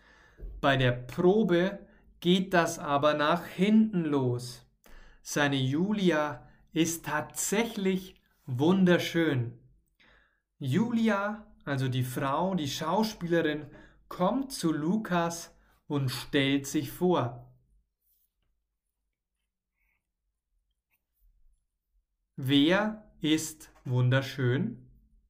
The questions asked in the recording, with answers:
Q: Wer ist wunderschön?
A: Julia. Julia, die Schauspielerin, ist wunderschön.